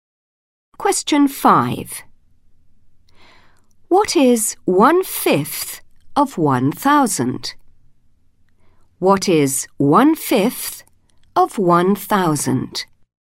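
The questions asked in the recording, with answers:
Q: What is 1/5 of 1,000?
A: 200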